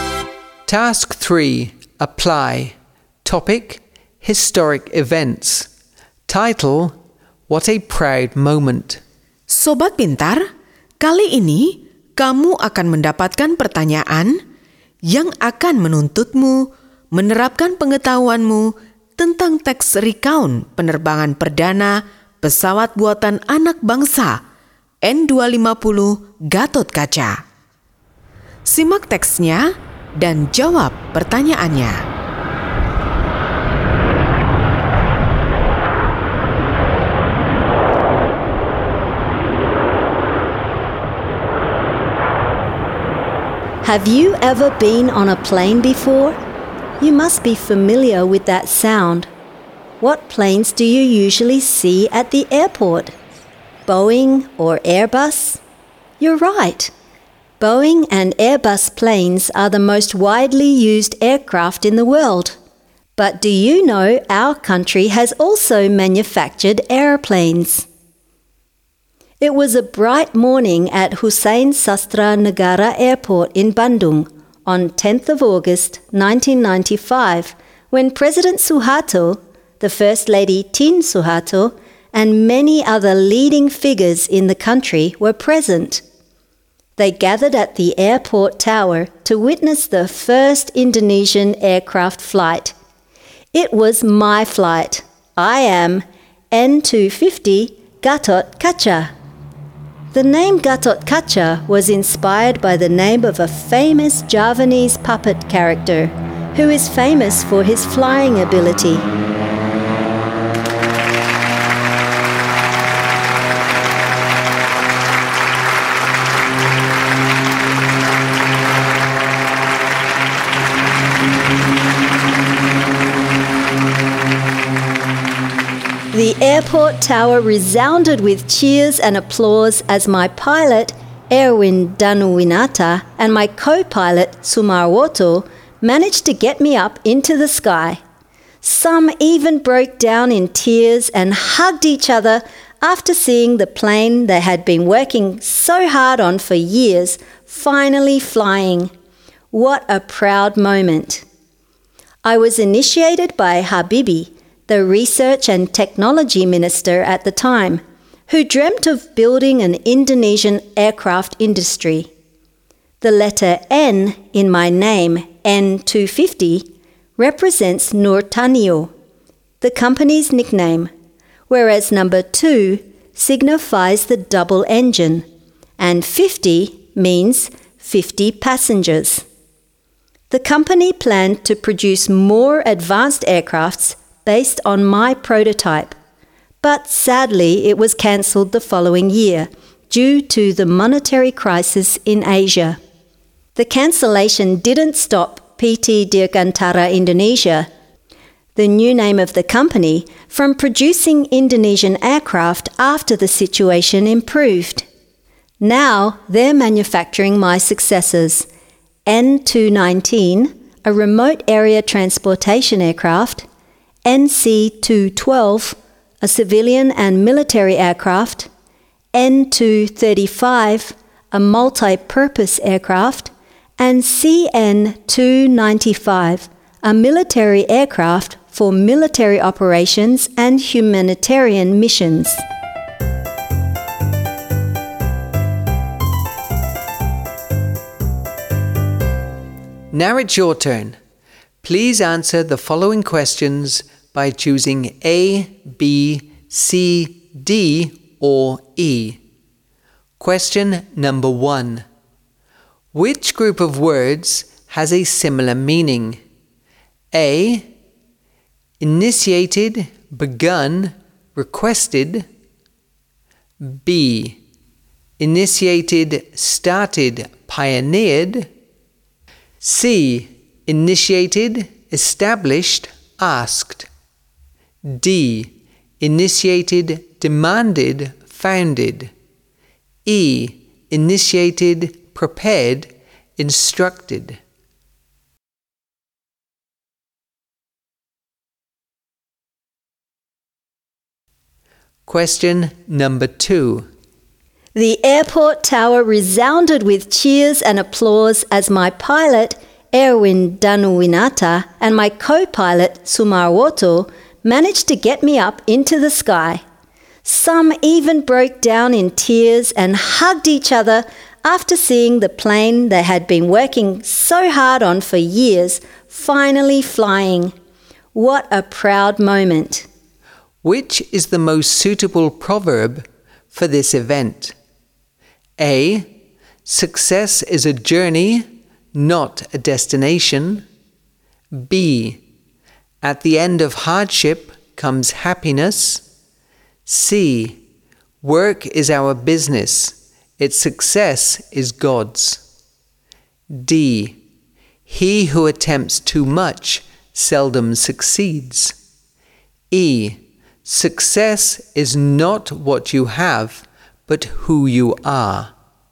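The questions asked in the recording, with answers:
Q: Which group of words has a similar meaning?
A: B: Initiated, started, pioneered.

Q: Which is the most suitable proverb for this event?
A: B: At the end of hardship comes happiness.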